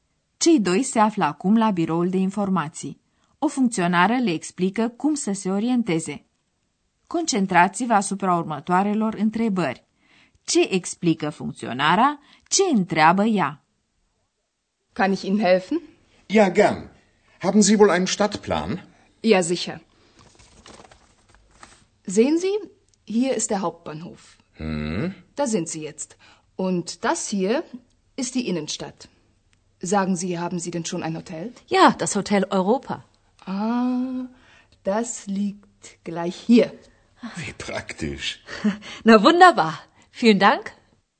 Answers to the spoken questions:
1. Funcționarea de la biroul de informații le arată pe plan unde se găsesc
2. și întreabă dacă au găsit deja un hotel.